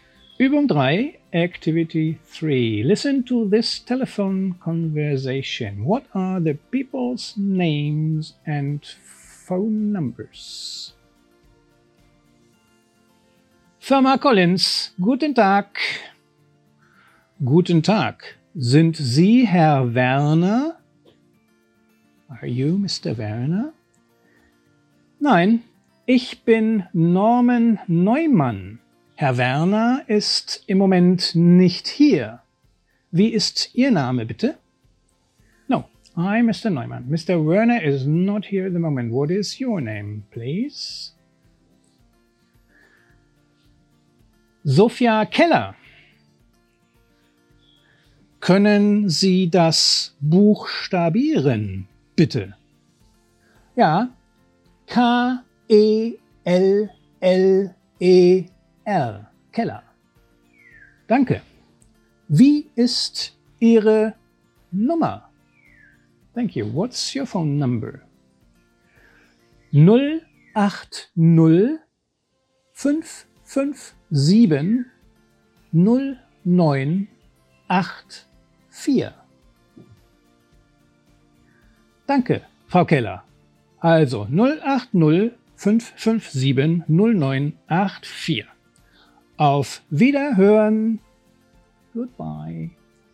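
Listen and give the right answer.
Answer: Norman Neumann and Sophia Keller; Frau Keller's number is 080 557 0984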